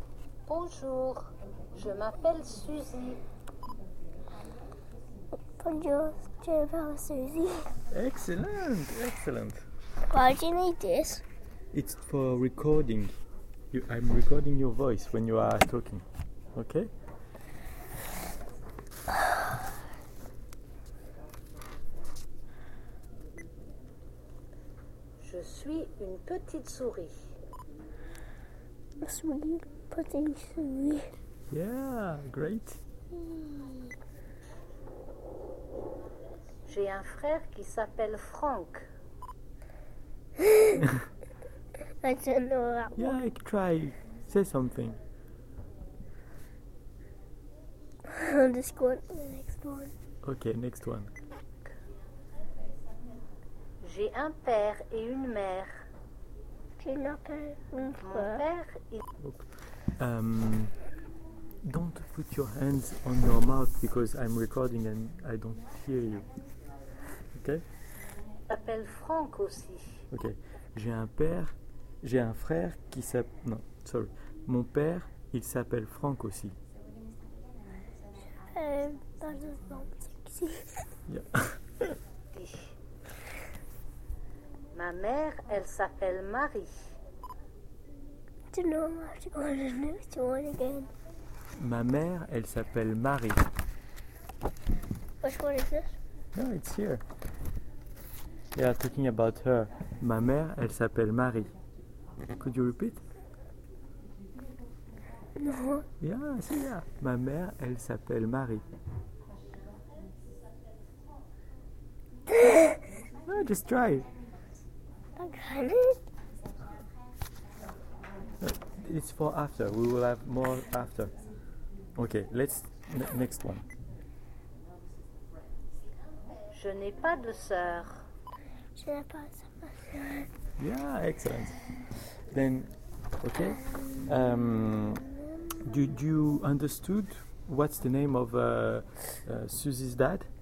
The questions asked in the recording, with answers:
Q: Do you understood what's the name of Susie's dad?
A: In fact, it's Frank.